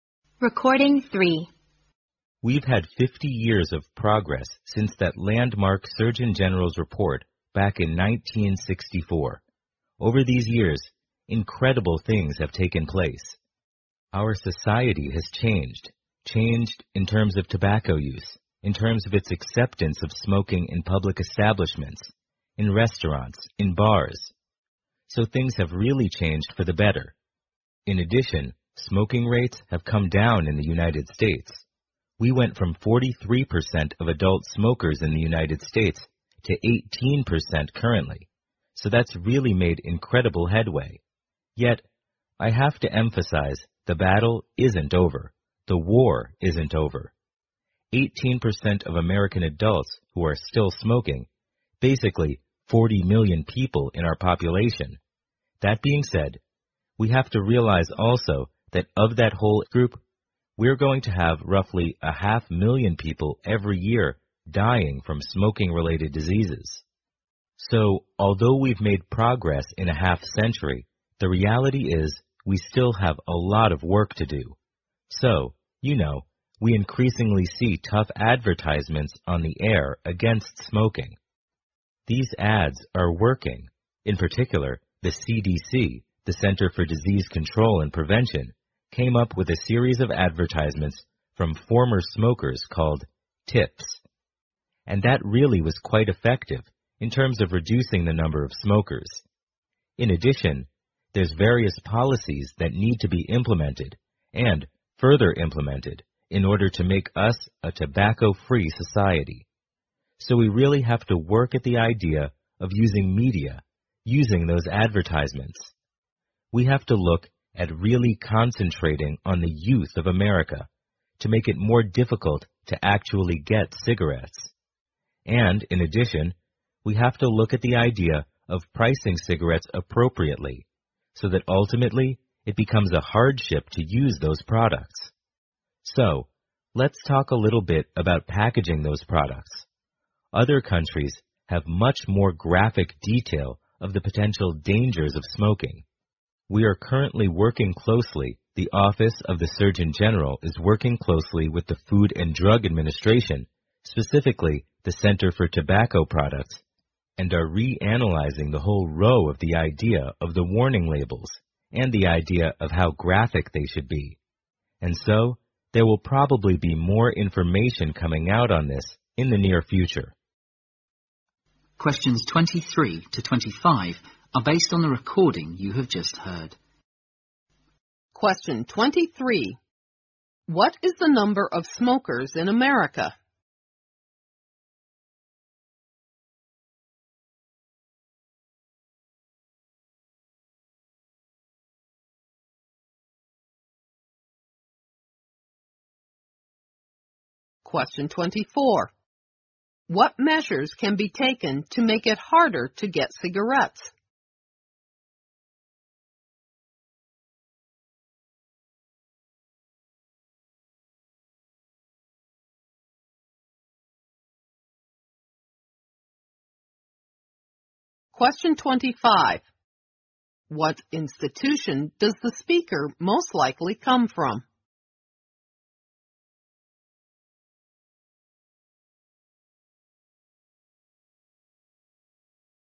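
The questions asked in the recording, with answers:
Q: What is the number of smokers in America?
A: About 40 million (18% of adults)

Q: What institution does the speaker most likely come from?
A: The Office of the Surgeon General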